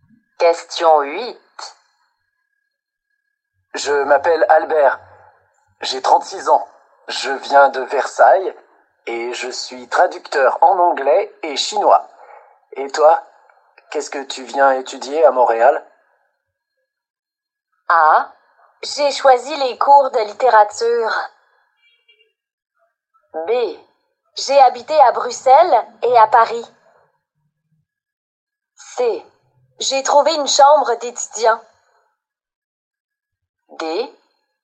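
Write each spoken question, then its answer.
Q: Et toi, qu'est-ce que tu viens étudier à Montréal?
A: A: J'ai choisi les cours de littérature.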